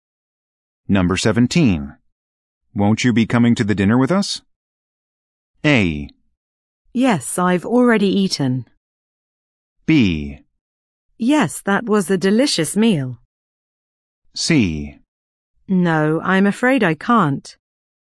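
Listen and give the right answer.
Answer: C: No, I'm afraid I can't.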